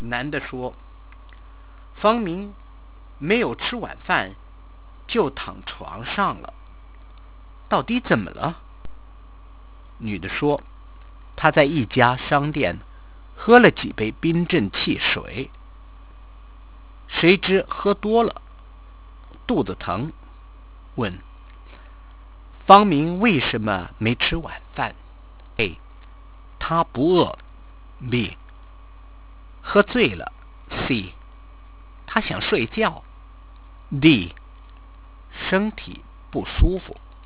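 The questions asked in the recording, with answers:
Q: 问方明为什么没吃晚饭。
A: D: 身体不舒服。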